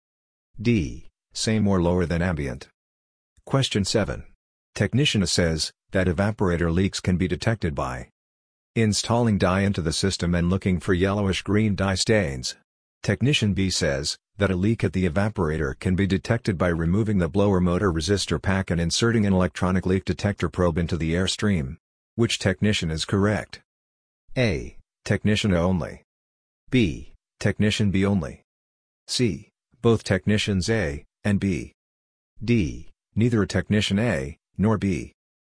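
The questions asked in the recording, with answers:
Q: Which technician is correct?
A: C: Both technicians A and B.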